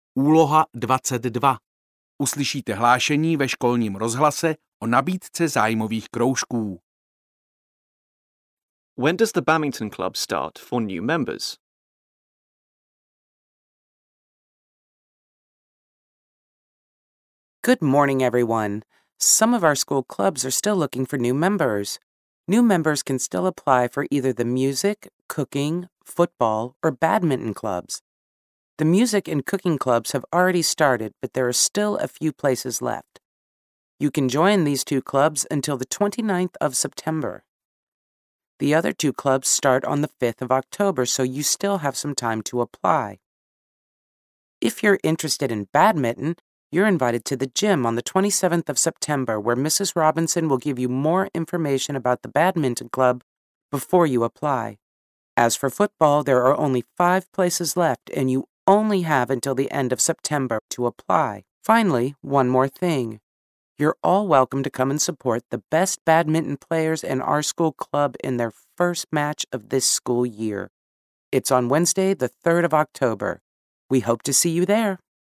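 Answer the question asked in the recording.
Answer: On the 5th of October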